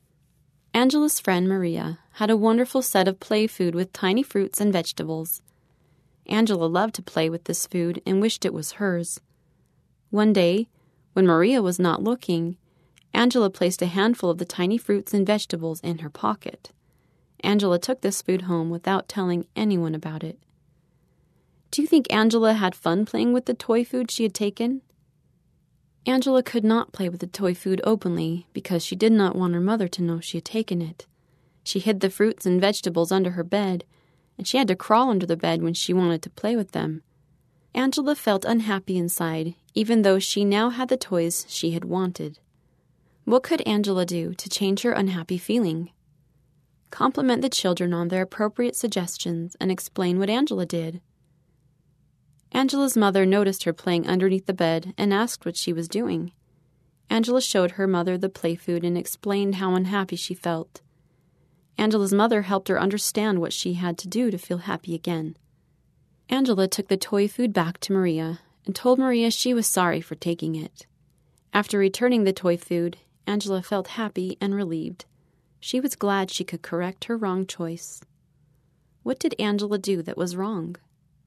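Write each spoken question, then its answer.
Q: What did Angela do that was wrong?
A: She took Maria's toy food without asking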